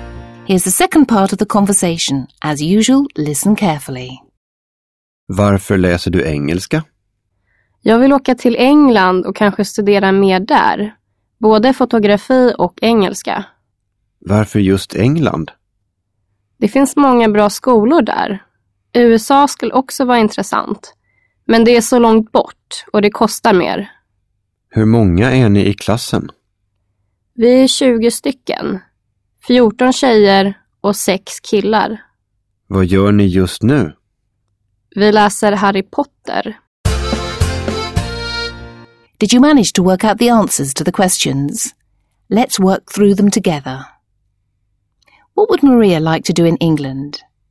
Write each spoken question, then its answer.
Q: What would Maria like to do in England?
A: In England, Maria would like to study English and photography.